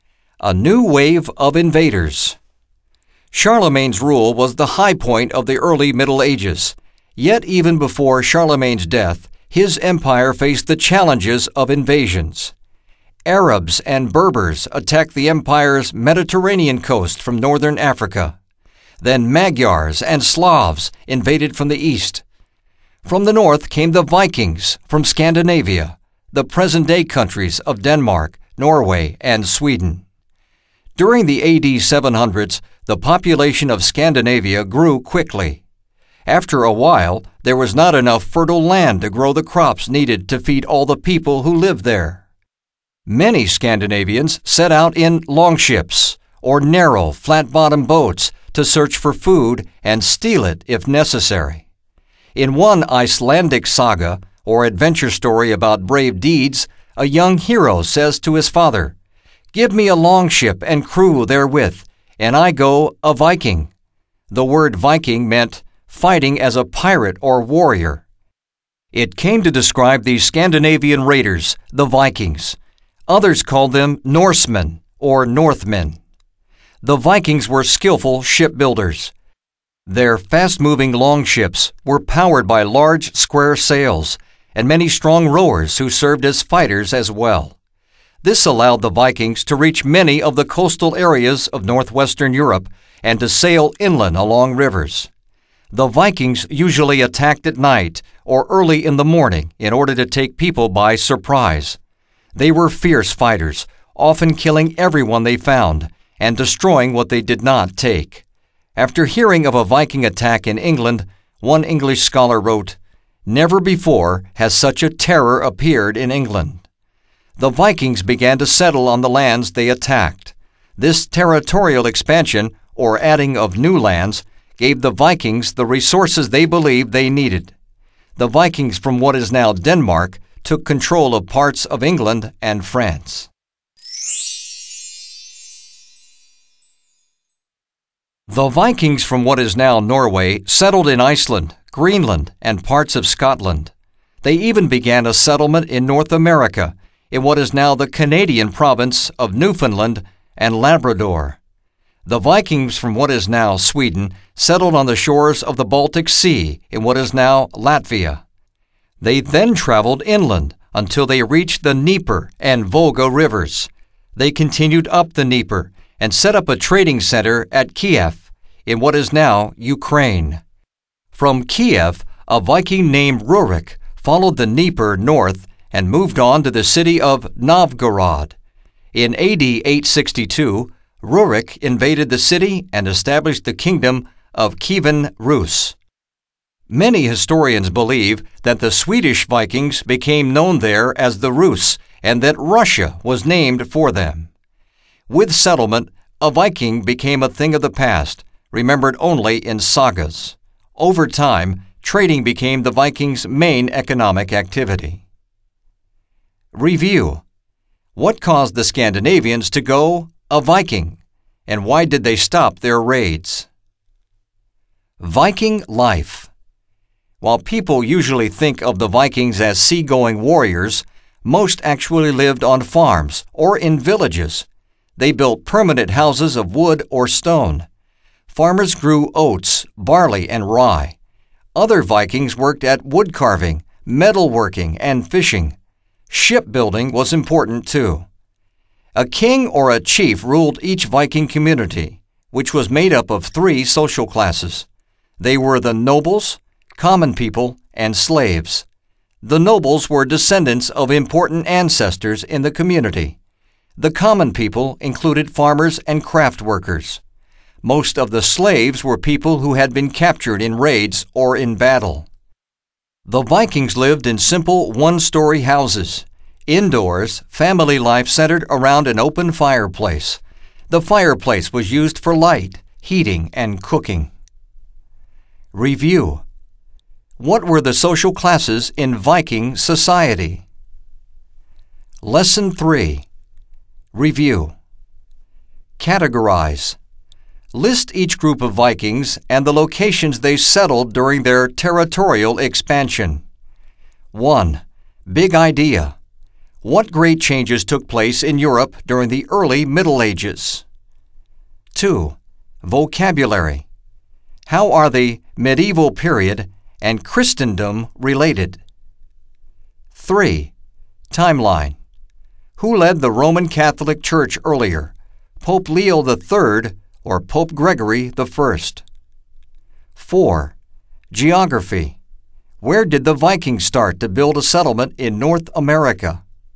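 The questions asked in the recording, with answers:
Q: What caused the Scandinavians to go a Viking? And why did they stop their raids?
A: Their population grew and there was not enough fertile land for food; they stopped after settling the lands they attacked and turning to trade

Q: What were the social classes in Viking society?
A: Nobles, common people, and slaves

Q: Where did the Vikings start to build a settlement in North America?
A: In what is now Newfoundland and Labrador, Canada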